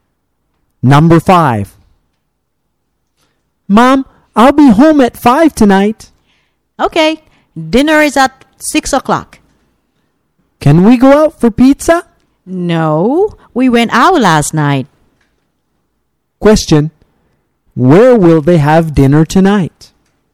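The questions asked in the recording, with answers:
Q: Question, where will they have dinner tonight?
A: At home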